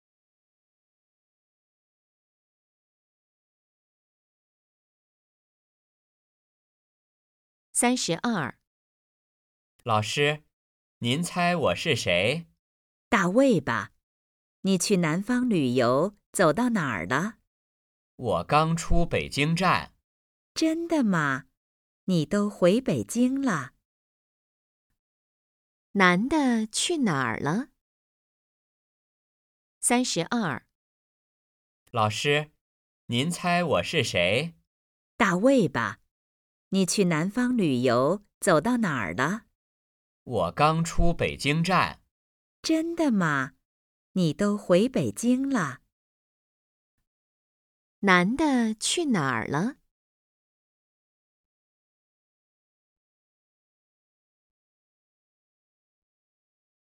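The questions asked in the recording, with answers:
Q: 男的去哪儿了?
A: 去南方旅游了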